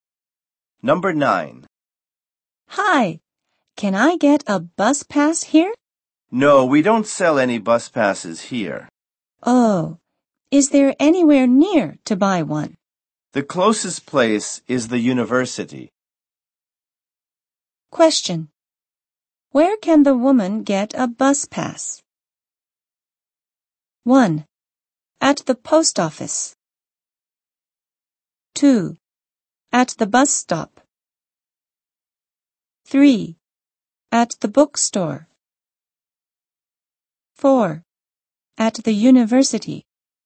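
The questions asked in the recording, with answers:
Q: Where can the woman get a bus pass?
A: 4: At the university.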